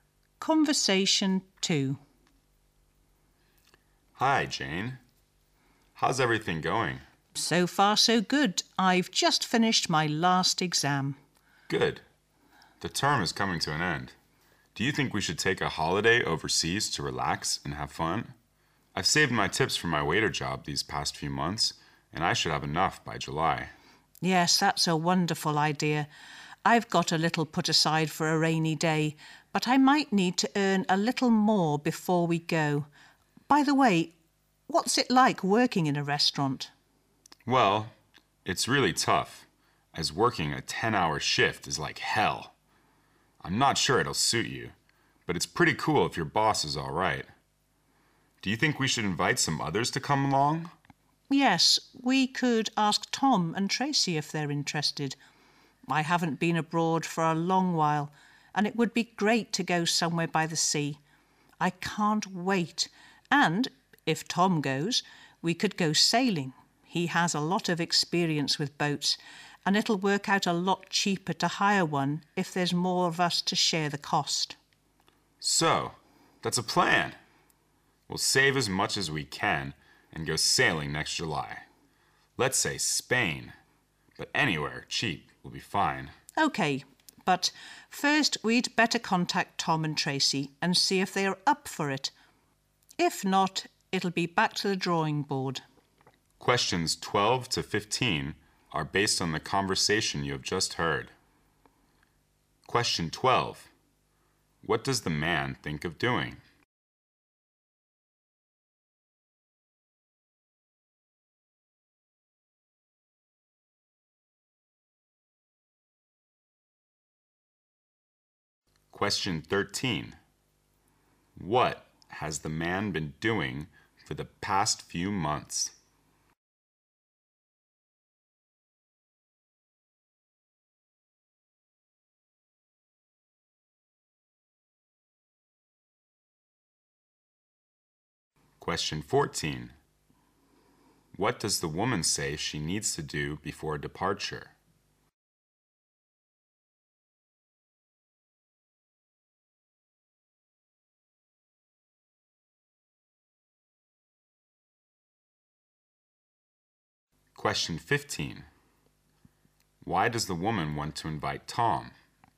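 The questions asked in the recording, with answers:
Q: What does the man think of doing?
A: Taking a holiday overseas

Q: What has the man been doing for the past few months?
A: Working as a waiter and saving his tips

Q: What does the woman say she needs to do before departure?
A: Earn a little more money

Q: Why does the woman want to invite Tom?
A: He has a lot of experience with boats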